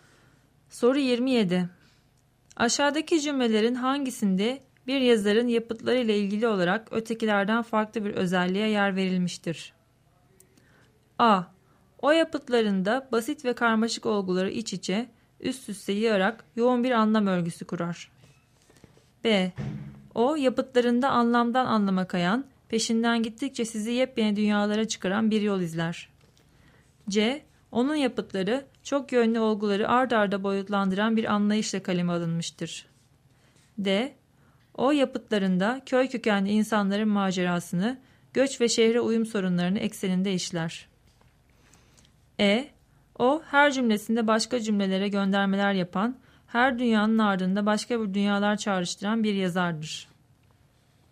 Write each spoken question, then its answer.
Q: Aşağıdaki cümlelerin hangisinde bir yazarın yapıtlarıyla ilgili olarak ötekilerden farklı bir özelliğe yer verilmiştir?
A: Doğru cevap D şıkkı.